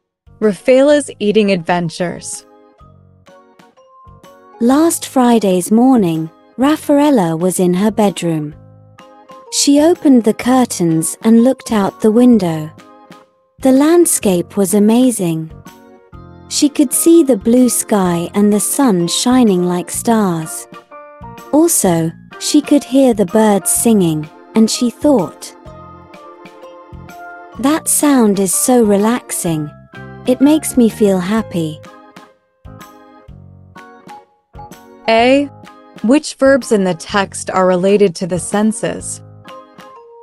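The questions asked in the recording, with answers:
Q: Which verbs in the text are related to the senses?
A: looked, see, hear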